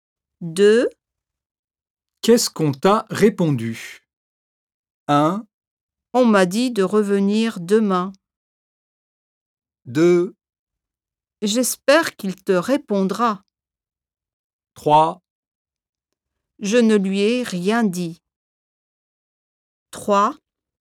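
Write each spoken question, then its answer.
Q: Qu'est-ce qu'on t'a répondu?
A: 1: On m'a dit de revenir demain.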